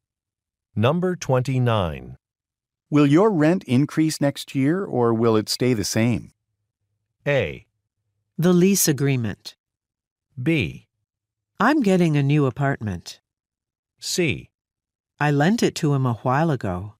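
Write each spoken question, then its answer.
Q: Will your rent increase next year or will it stay the same?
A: B: I'm getting a new apartment.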